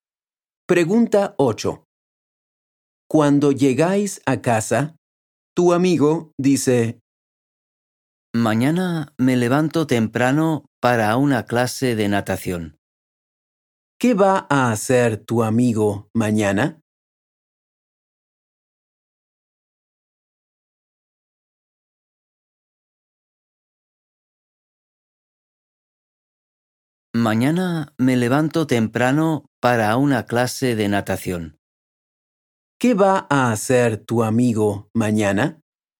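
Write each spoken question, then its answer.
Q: ¿Qué va a hacer tu amigo mañana?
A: Una clase de natación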